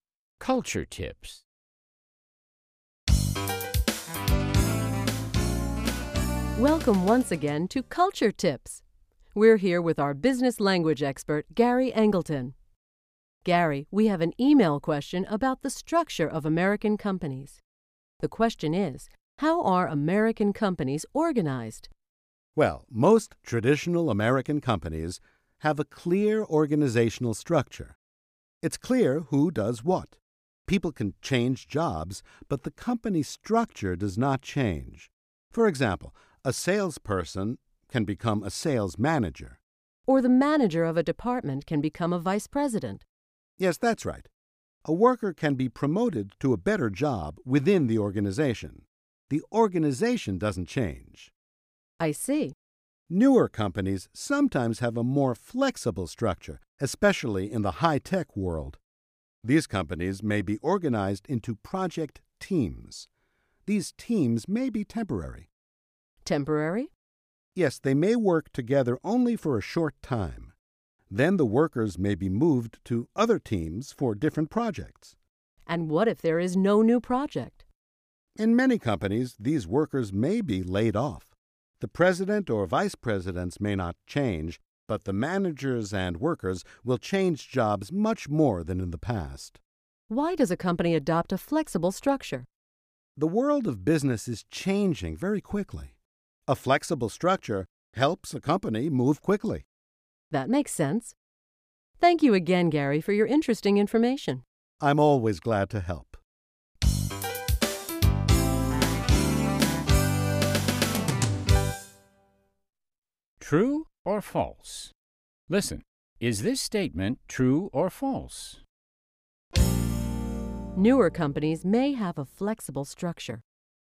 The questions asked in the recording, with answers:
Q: Newer companies may have a flexible structure.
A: True. Newer companies, especially high-tech companies, often have a more flexible structure than traditional companies.